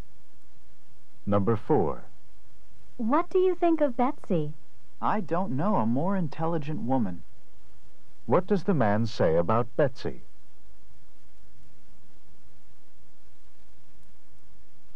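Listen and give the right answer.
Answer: She is extremely intelligent.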